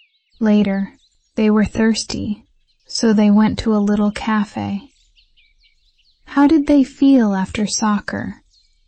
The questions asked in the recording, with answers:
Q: How did they feel after soccer?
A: Thirsty. They felt thirsty.